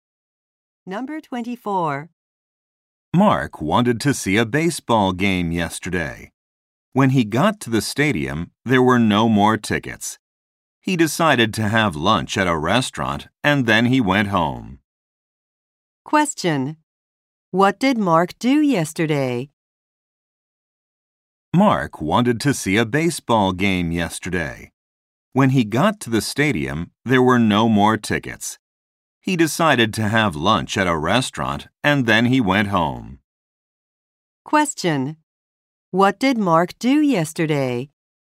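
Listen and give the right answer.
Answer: He had lunch at a restaurant.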